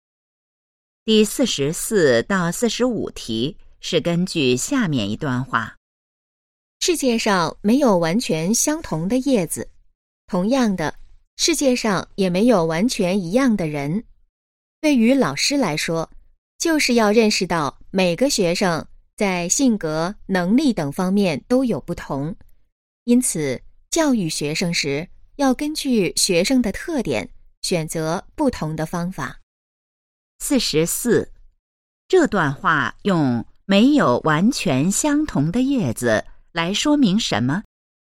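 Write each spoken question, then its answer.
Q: 这段话用没有完全相同的叶子来说明什么?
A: 世界上没有完全一样的人,每个学生都不同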